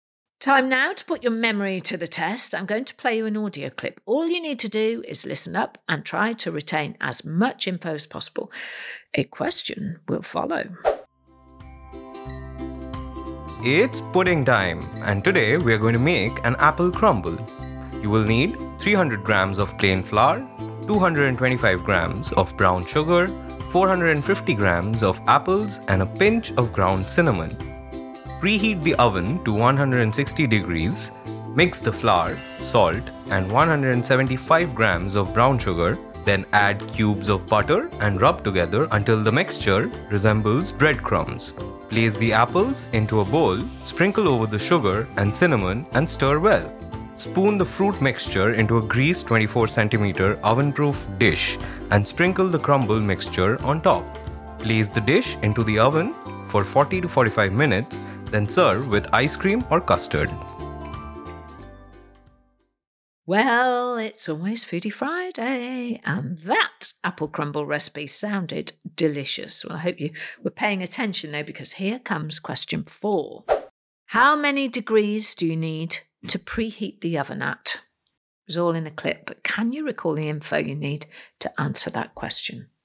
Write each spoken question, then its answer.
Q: How many degrees do you need to preheat the oven at?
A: The answer was 160 degrees.